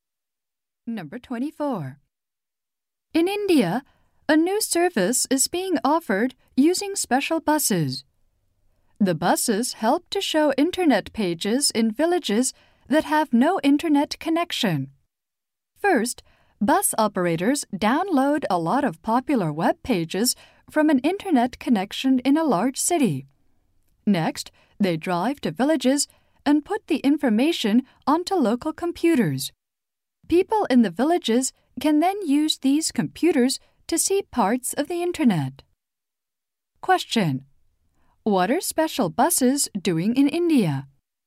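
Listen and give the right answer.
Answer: Bringing downloaded web pages to villages without internet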